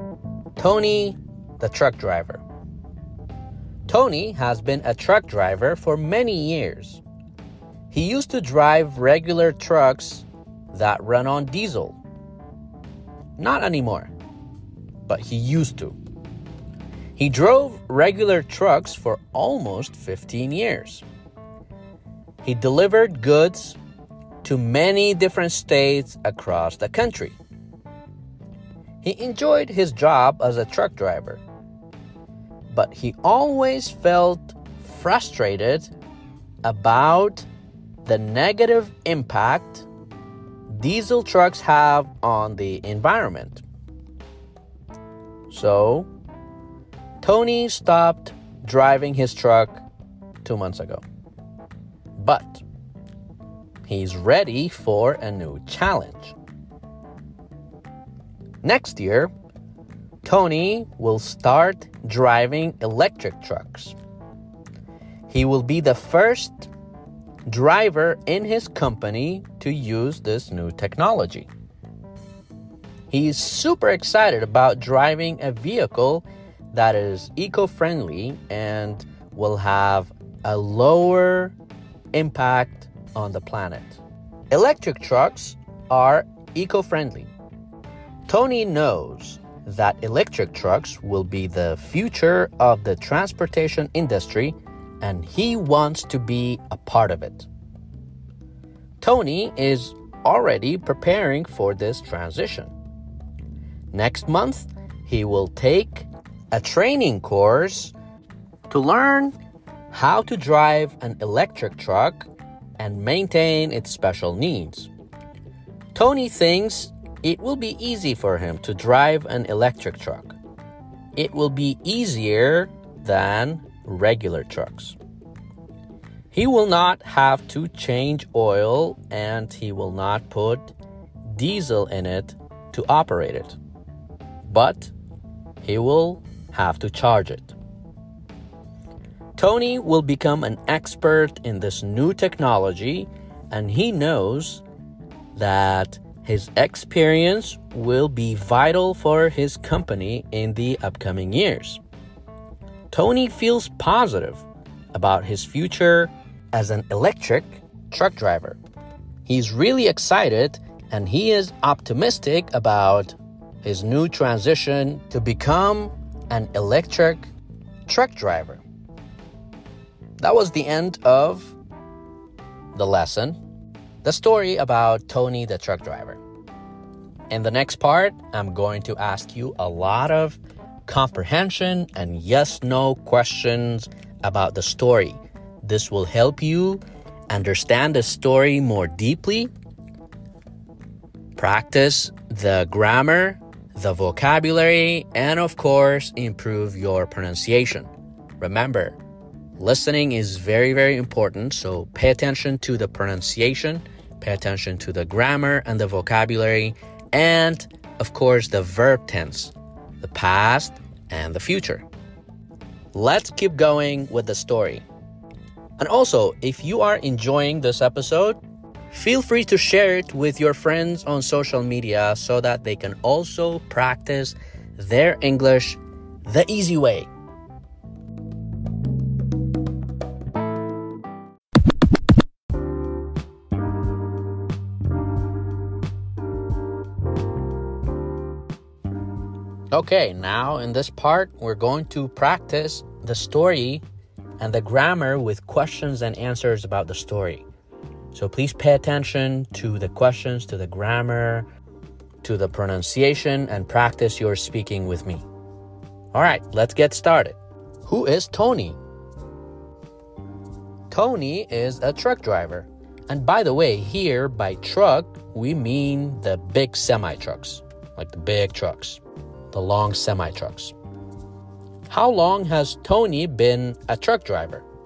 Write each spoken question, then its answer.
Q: How long has Tony been a truck driver?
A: He has been a truck driver for almost 15 years.